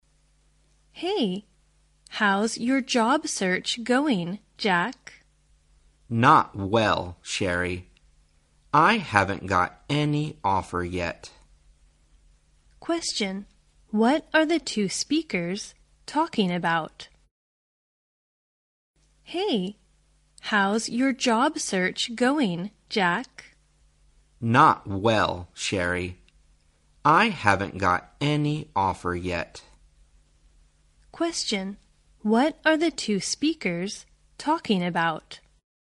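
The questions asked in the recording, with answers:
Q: what are the two speakers talking about?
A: Jack's job search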